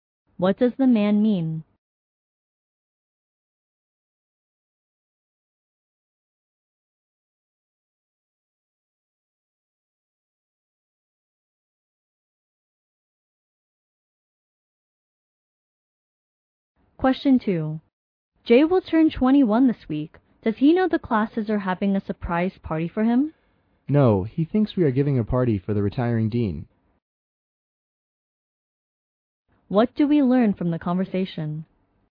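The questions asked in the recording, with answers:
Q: What do we learn from the conversation?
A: Jay doesn't know about his surprise birthday party; he thinks it's for the retiring dean.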